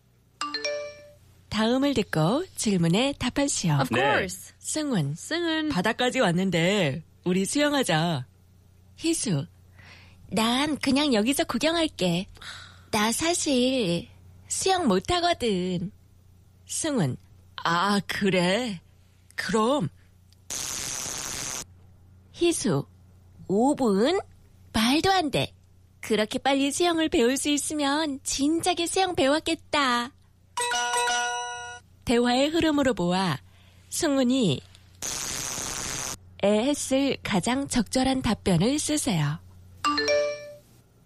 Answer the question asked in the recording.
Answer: So the complete sentence should be 내가 5분 안에 수영하는 방법을 가르쳐줄게.